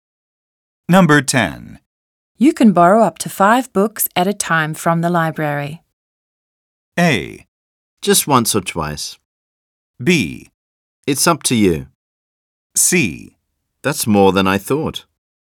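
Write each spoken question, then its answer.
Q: You can borrow up to 5 books at a time from the library.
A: C: That's more than I thought.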